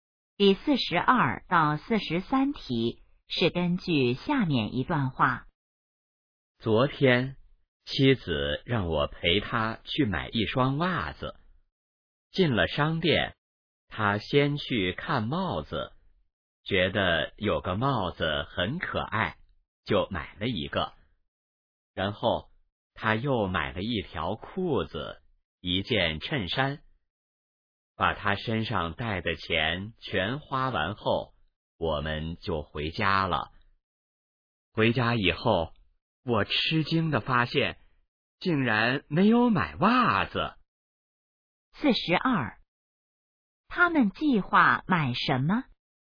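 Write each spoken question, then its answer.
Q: 他们计划买什么?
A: 袜子

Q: 说话人是谁?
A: 丈夫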